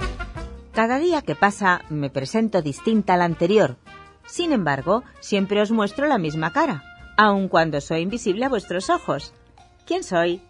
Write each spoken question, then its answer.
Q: ¿Quién soy?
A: Solución, la luna.